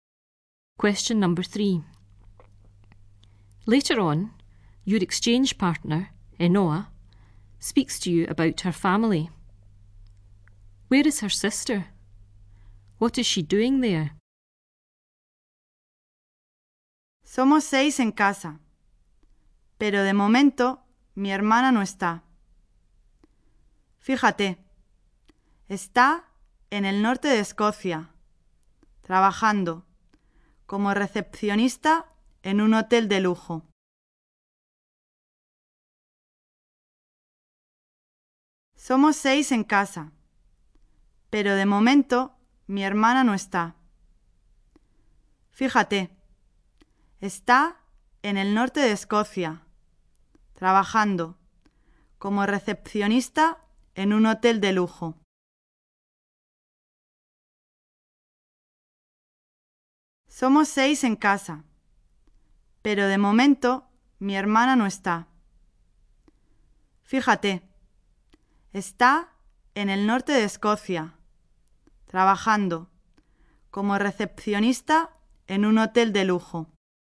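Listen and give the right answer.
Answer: In the north of Scotland, working as a receptionist in a luxury hotel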